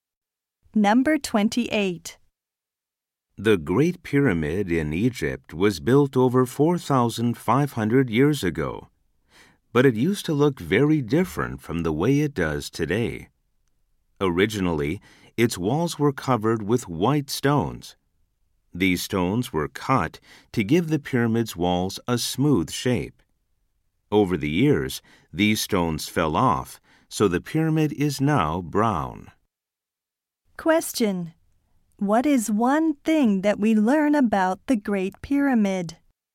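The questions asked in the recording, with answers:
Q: What is one thing that we learn about the Great Pyramid?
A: Its walls were originally covered with white stones.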